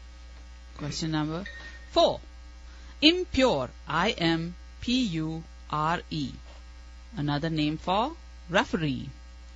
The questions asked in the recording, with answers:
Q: Impure, I-M-P-U-R-E.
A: Umpire.